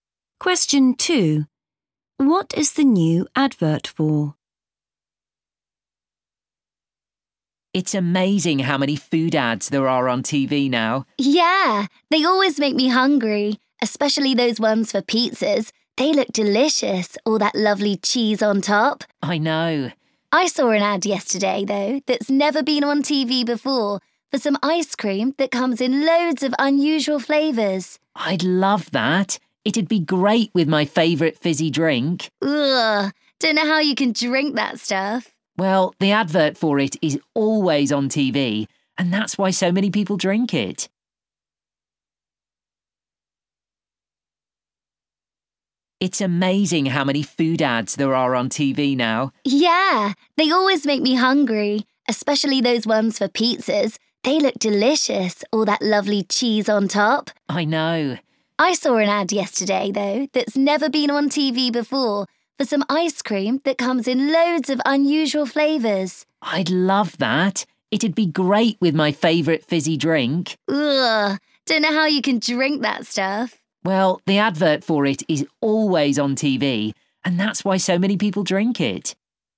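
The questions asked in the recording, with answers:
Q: What is the new advert for?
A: ice cream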